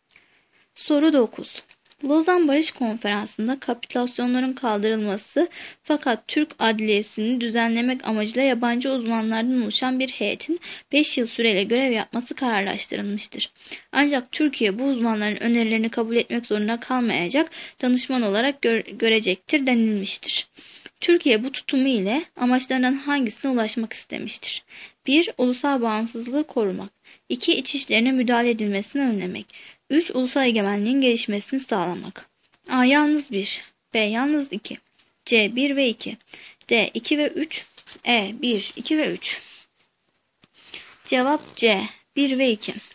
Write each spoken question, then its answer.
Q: Türkiye bu tutumu ile amaçlarının hangisine ulaşmak istemiştir?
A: Cevap C. 1 ve 2.